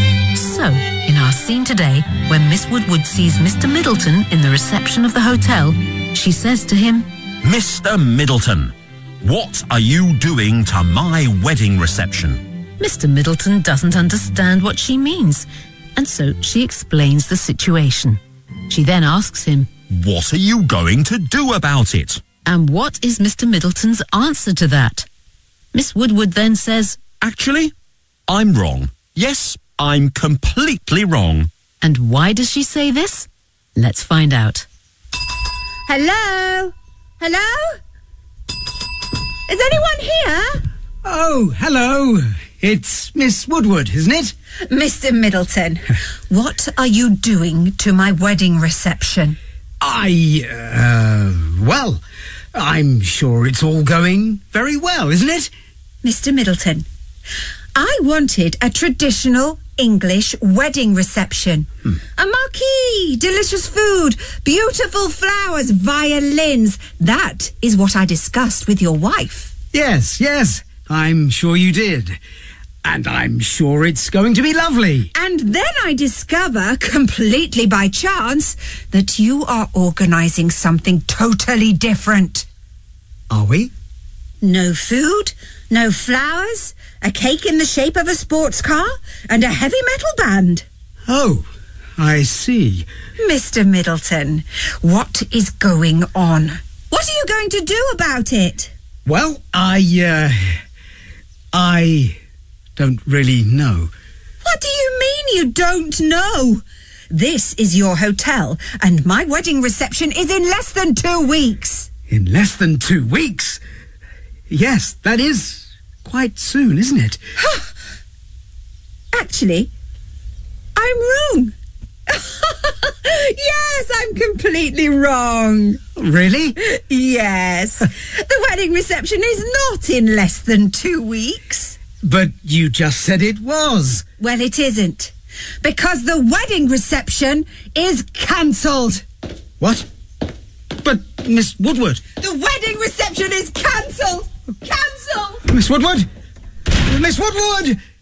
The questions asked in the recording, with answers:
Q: And what is Mr. Middleton's answer to that?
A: I don't really know.

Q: And why does she say this?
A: the wedding reception is not in less than 2 weeks, because the wedding reception is cancelled.